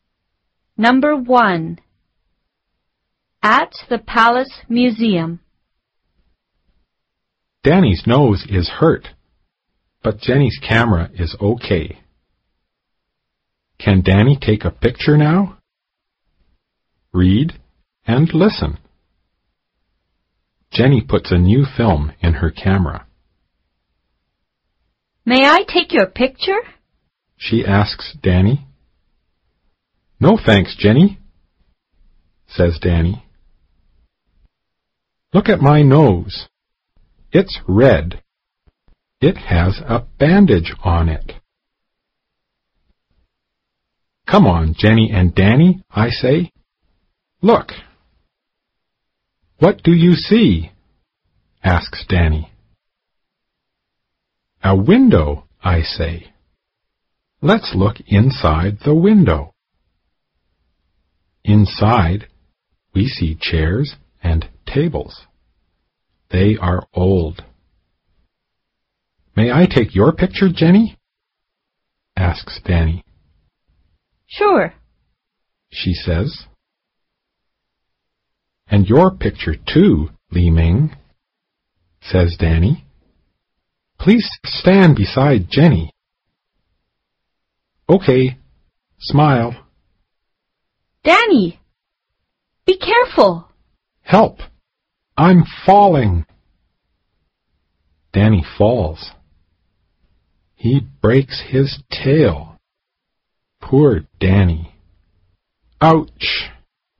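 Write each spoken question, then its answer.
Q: Can Danny take a picture now?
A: Yes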